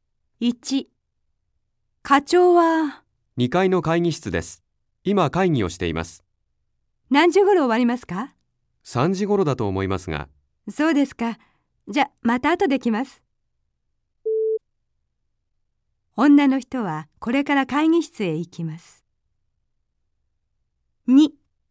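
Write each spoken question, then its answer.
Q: 女の人はこれから会議室へ行きます。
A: いいえ(×)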